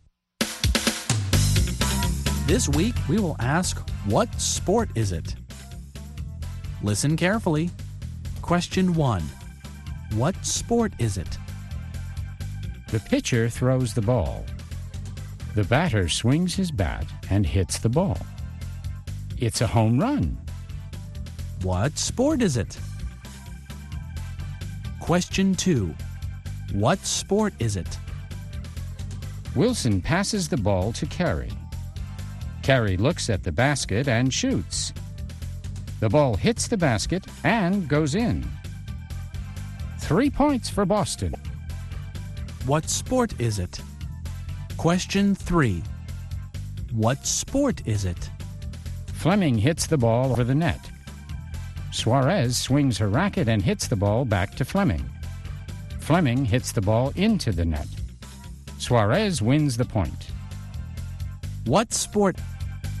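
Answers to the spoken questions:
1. Baseball
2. Basketball
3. Tennis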